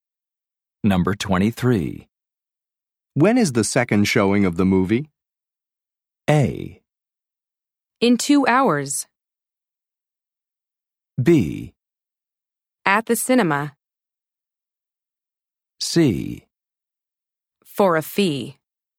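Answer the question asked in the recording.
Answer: A: In 2 hours.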